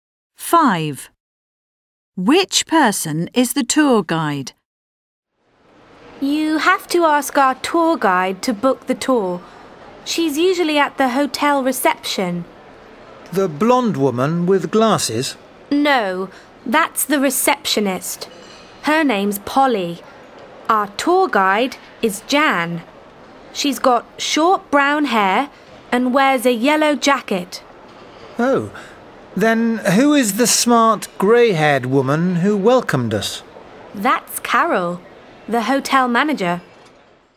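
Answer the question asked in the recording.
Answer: Jan, the woman with short brown hair and a yellow jacket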